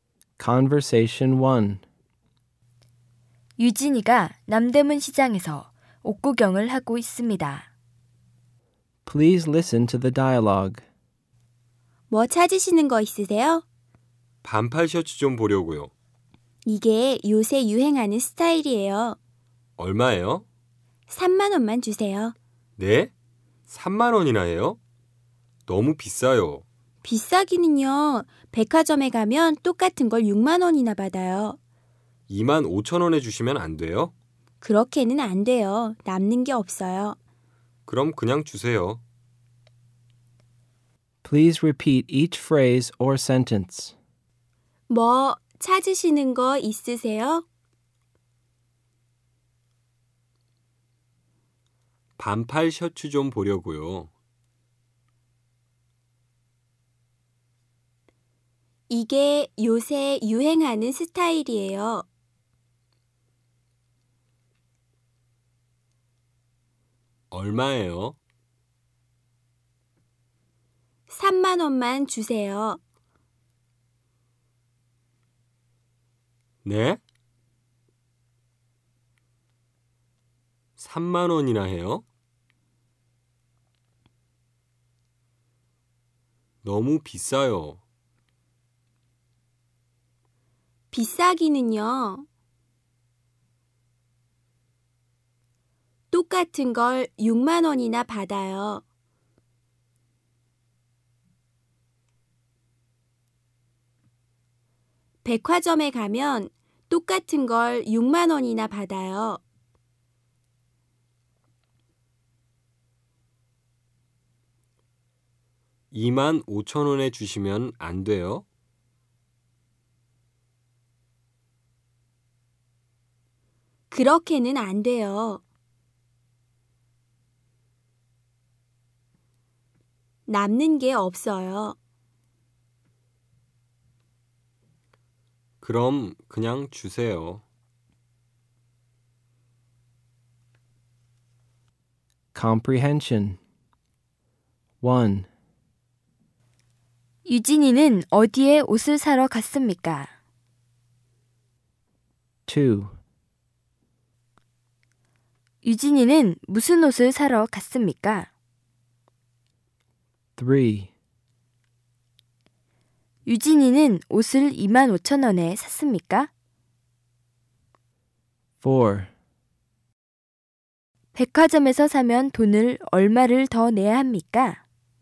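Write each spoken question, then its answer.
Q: 유진이는 어디에 옷을 사러 갔습니까?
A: 남대문 시장

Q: 유진이는 무슨 옷을 사러 갔습니까?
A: 반팔 셔츠

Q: 유진이는 옷을 2만 5천 원에 샀습니까?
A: 아니요, 3만 원에 샀습니다

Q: 백화점에서 사면 돈을 얼마를 더 내야 합니까?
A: 3만 원 더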